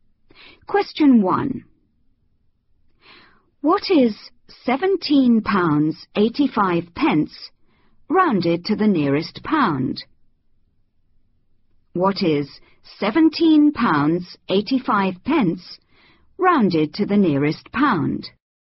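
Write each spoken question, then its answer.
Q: What is 17 pounds 85 pence rounded to the nearest pound?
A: £18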